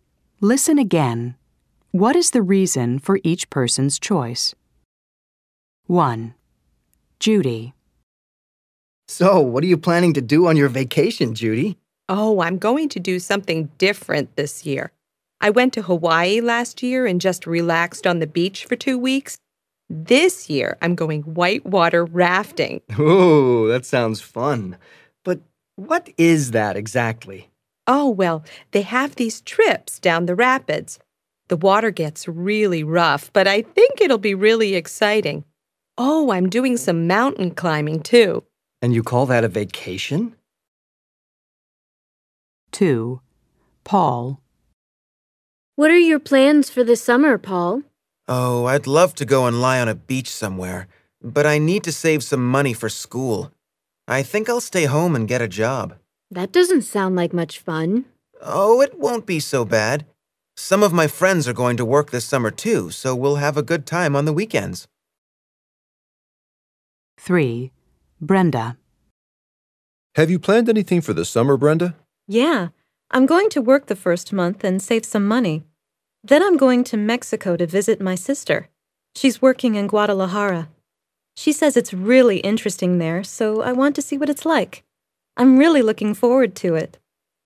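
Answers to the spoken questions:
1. Judy wants to do something different and exciting this year (whitewater rafting) instead of relaxing on the beach again.
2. Paul needs to save money for school, so he'll stay home and get a job.
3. Brenda wants to visit her sister in Mexico and see what Guadalajara is like.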